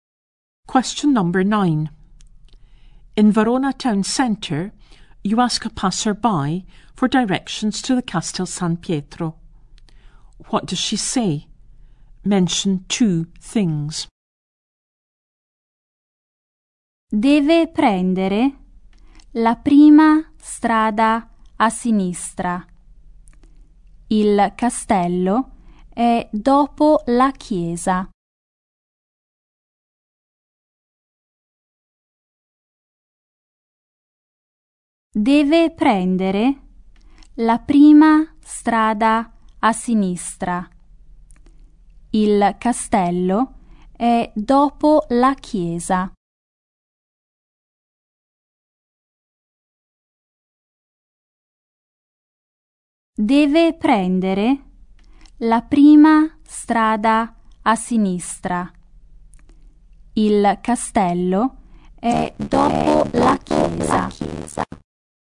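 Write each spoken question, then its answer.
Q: What does she say?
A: Take the first street on the left; the castle is after the church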